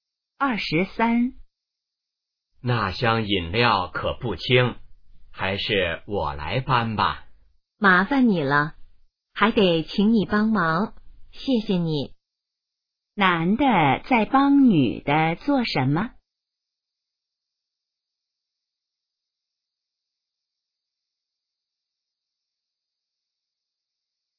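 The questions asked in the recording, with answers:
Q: 男的在帮女的做什么?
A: 搬饮料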